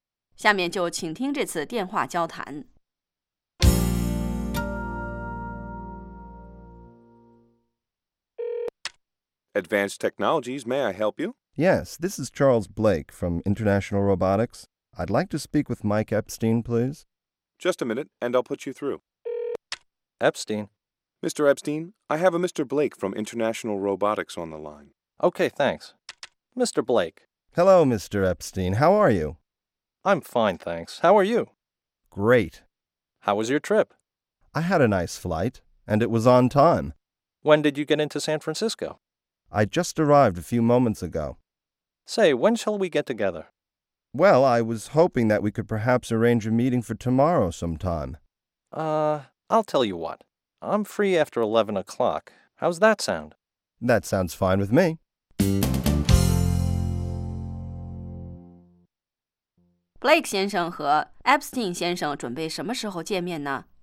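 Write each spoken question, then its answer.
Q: Blake 先生和 Epstein 先生准备什么时候见面呢?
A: 明天11点以后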